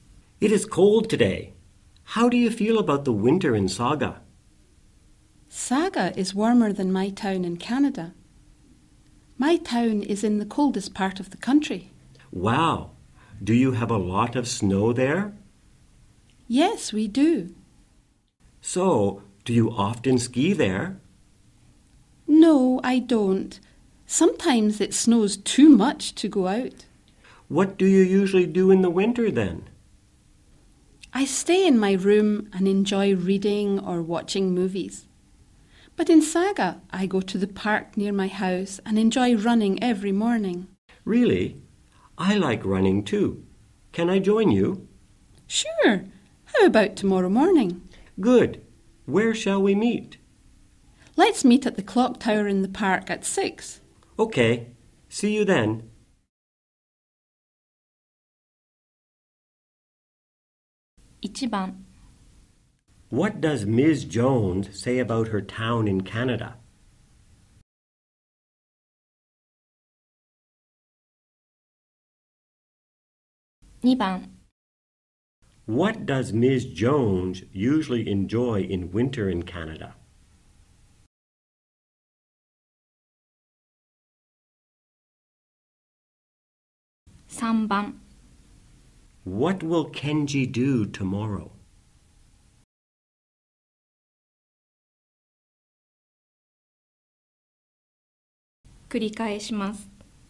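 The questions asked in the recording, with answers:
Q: Jones say about her town in Canada?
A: It is in the coldest part of the country and colder than Saga.

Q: What does Ms. Jones usually enjoy in winter in Canada?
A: Reading or watching movies in her room.

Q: What will Kenji do tomorrow?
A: Go running with Ms. Jones in the park, meeting at the clock tower at 6.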